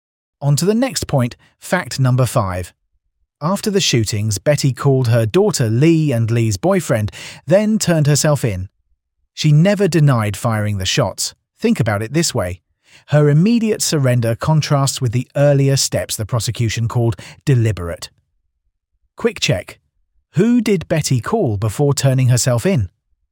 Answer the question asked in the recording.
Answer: Her daughter Lee and Lee's boyfriend.